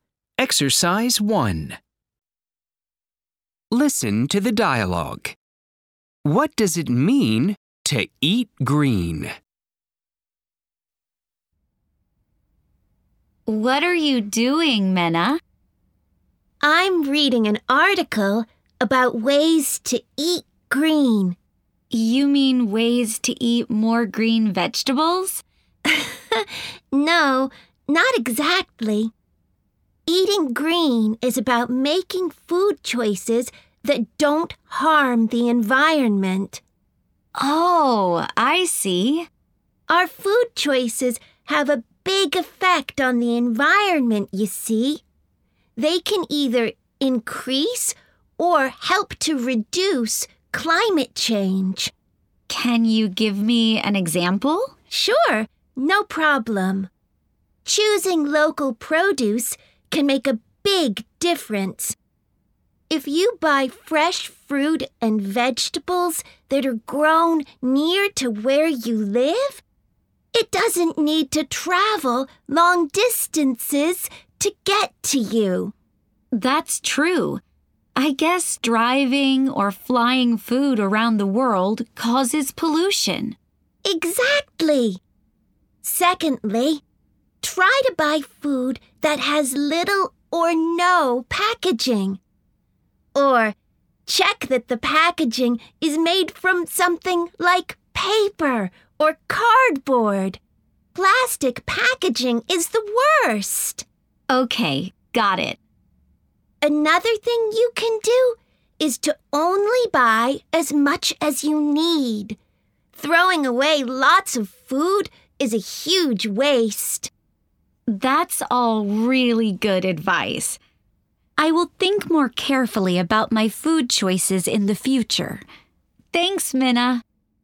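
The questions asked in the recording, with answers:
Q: What does it mean to eat green?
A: Making food choices that don't harm the environment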